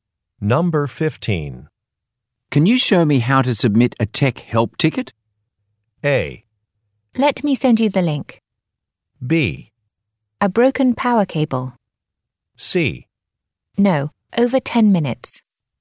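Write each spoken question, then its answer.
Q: Can you show me how to submit a tech help ticket?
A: A: Let me send you the link.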